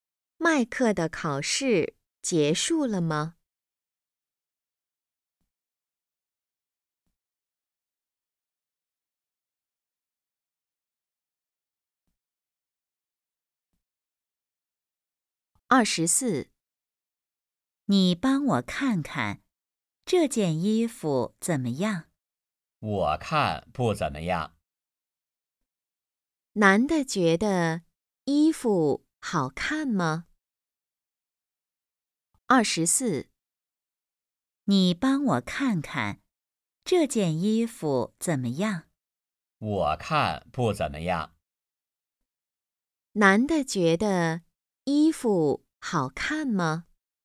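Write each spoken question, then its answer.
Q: 男的觉得衣服好看吗?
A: 不好看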